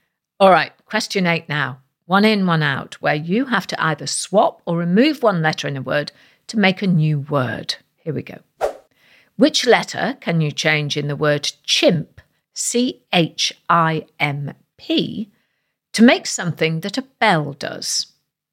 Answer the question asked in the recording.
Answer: Well, if you change the last letter, the P, for a letter E, you get the word chime, C-H-I-M-E.